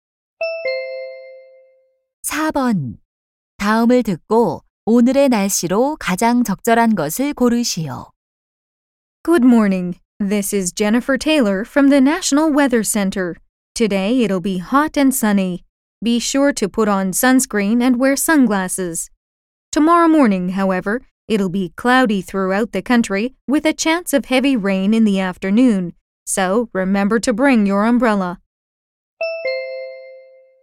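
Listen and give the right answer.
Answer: 덥고 맑음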